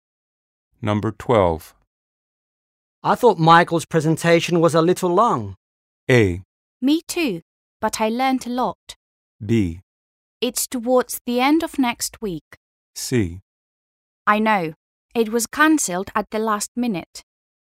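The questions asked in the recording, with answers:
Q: I thought Michael's presentation was a little long.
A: A: Me too, but I learned a lot.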